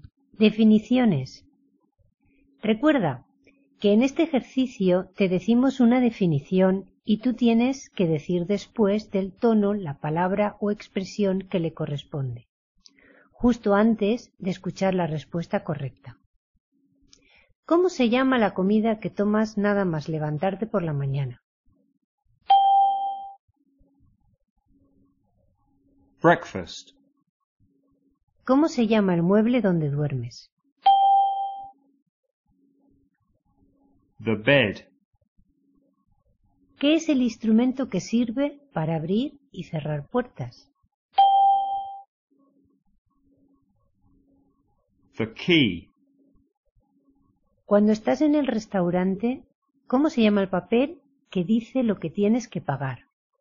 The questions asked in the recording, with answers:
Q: ¿Cómo se llama la comida que tomas nada más levantarte por la mañana?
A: Breakfast.

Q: ¿Cómo se llama el mueble donde duermes?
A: The bed.

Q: ¿Qué es el instrumento que sirve para abrir y cerrar puertas?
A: The key.